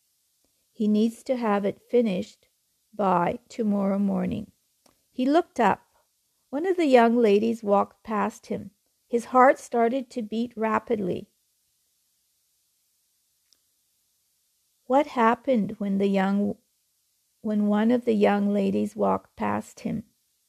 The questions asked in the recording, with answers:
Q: What happened when one of the young ladies walked past him?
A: His heart started to beat rapidly.